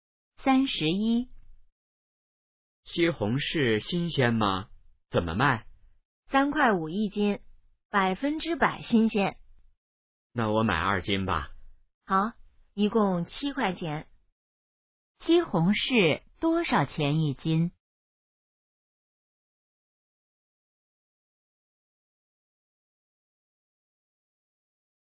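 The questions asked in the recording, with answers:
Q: 西红柿多少钱一斤?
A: 三块五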